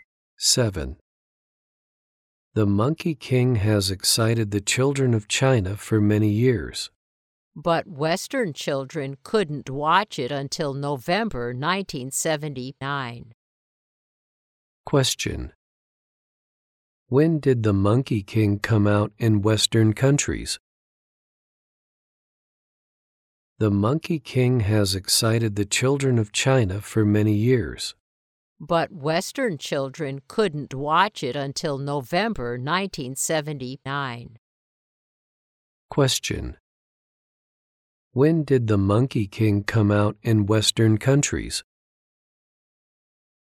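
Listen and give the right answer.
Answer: In November 1979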